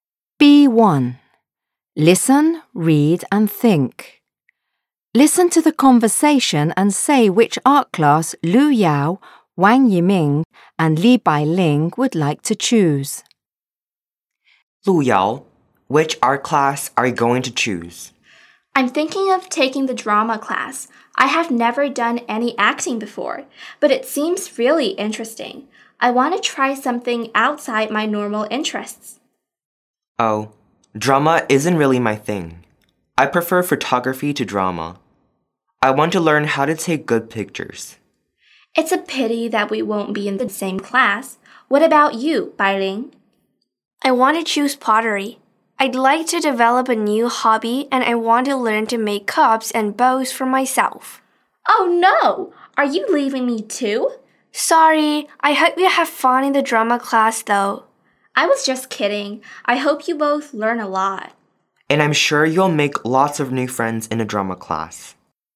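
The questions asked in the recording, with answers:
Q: Listen to the conversation and say which art class Lu Yao, Wang Yiming and Li Bailing would like to choose.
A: Lu Yao: drama; Wang Yiming: photography; Li Bailing: pottery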